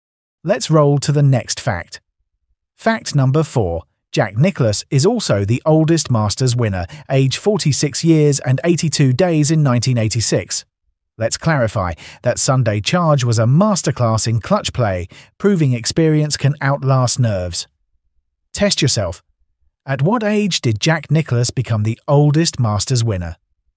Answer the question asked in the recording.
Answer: Correct answer. 46.